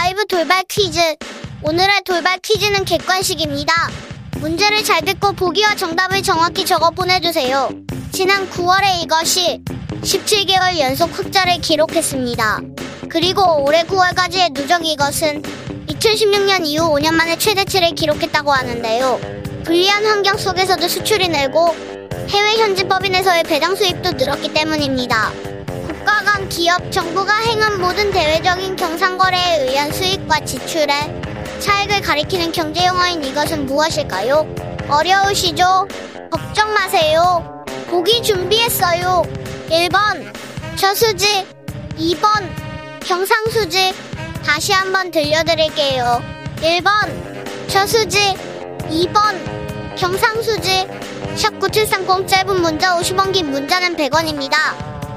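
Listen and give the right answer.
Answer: 2: 경상수지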